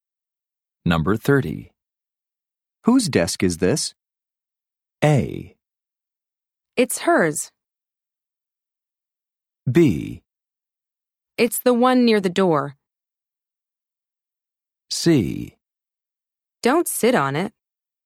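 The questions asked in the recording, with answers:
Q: Whose desk is this?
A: A: It's hers.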